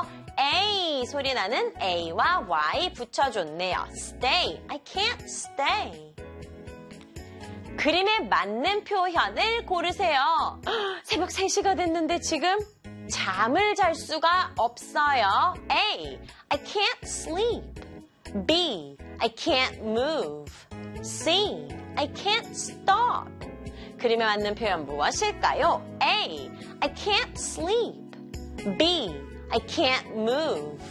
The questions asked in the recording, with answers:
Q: 그림에 맞는 표현 무엇일까요?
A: 정답은 A. I can't sleep.